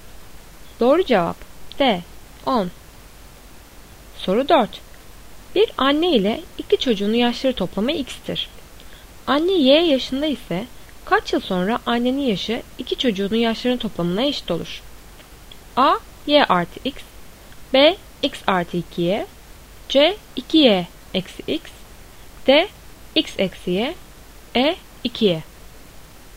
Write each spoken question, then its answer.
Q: Anne y yaşında ise kaç yıl sonra annenin yaşı iki çocuğunun yaşlarının toplamına eşit olur?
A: Doğru cevap C 2y eksi x.